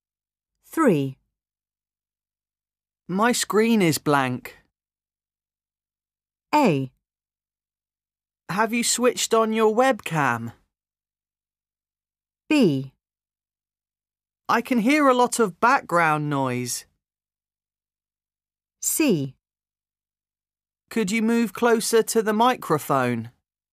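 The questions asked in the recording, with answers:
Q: My screen is blank.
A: A: Have you switched on your webcam?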